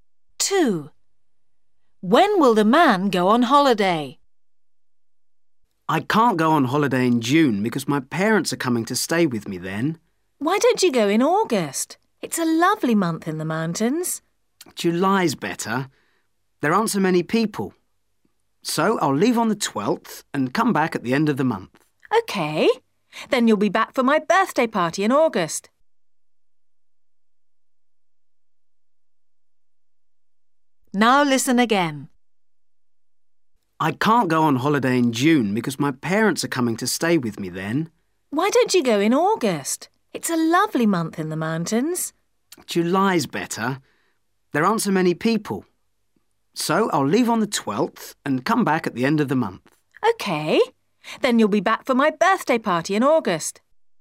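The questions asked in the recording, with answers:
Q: When will the man go on holiday?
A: July (the 12th)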